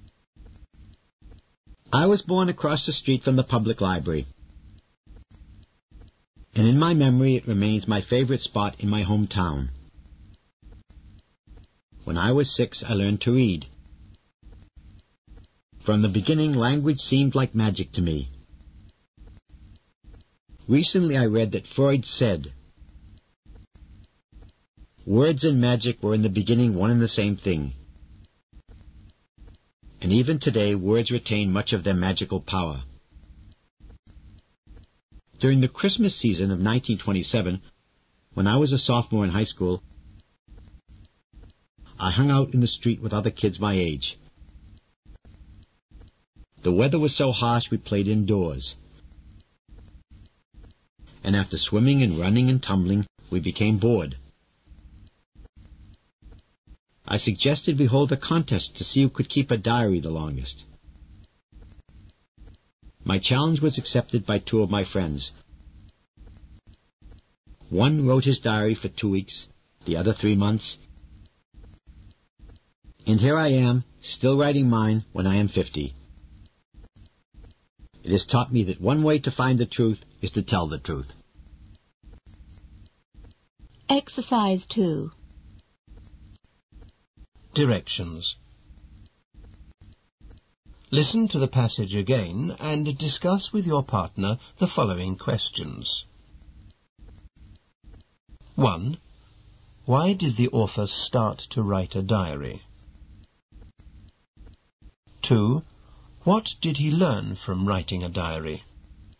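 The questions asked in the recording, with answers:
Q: Why did the author start to write a diary?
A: Because he suggested a contest with his friends to see who could keep a diary the longest, as they were bored indoors.

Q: What did he learn from writing a diary?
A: That one way to find the truth is to tell the truth.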